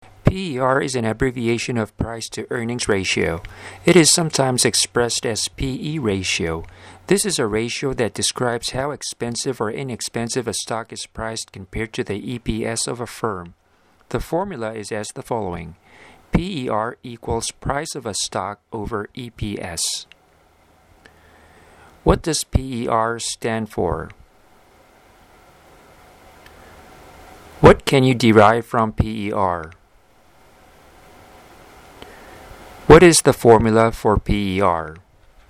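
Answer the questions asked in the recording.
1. Price-to-earnings ratio
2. How expensive or inexpensive a stock is priced compared to the firm's EPS
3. PER = price of a stock / EPS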